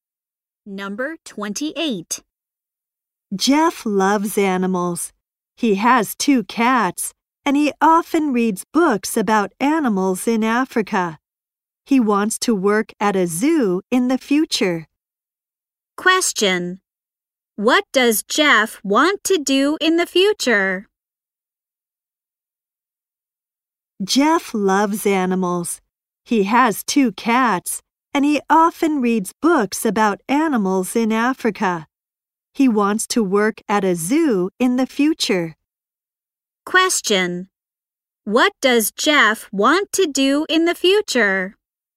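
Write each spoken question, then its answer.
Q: Question. What does Jeff want to do in the future?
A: Work at a zoo.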